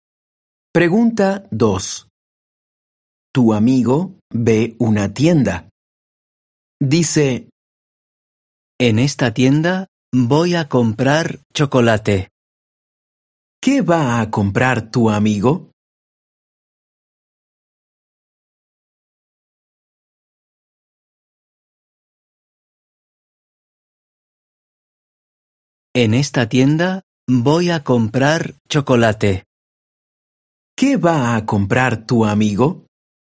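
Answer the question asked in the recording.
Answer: Chocolate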